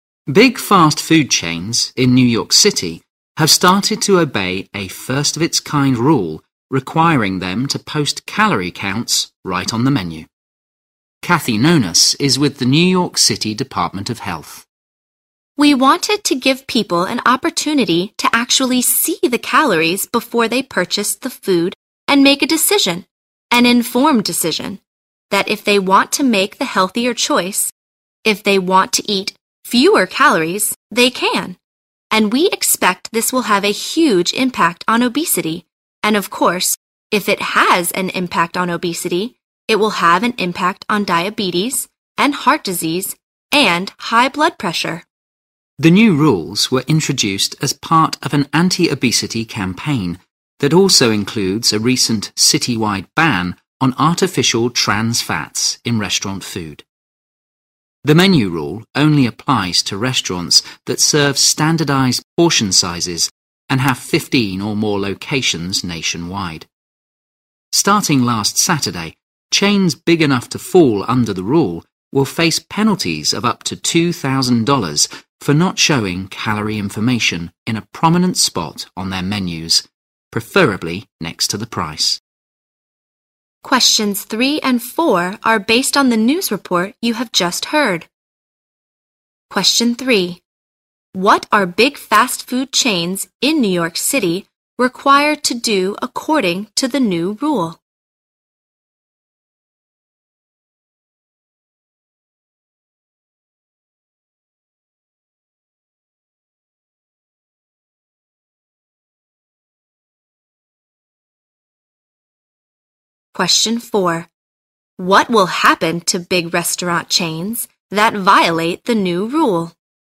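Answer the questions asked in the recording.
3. Post calorie counts right on the menu
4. They will face penalties of up to $2,000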